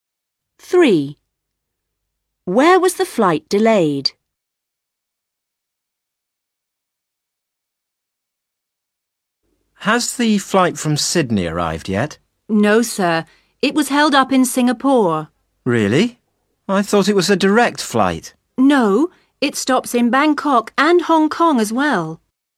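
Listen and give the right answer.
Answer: In Singapore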